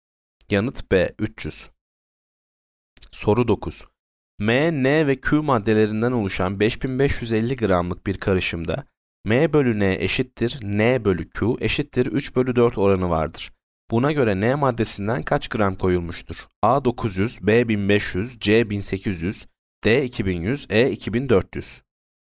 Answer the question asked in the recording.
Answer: Yanıt C 1800.